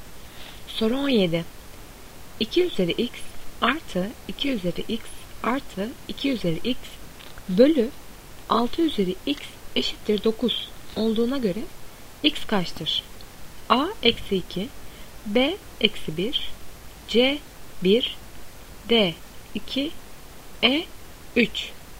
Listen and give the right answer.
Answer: Doğru cevap B. Eksi 1.